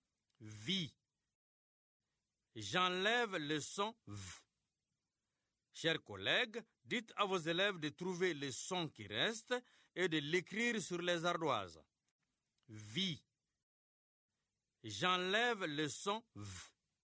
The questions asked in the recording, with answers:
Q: Vie. J'enlève le son V.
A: C'est le son I.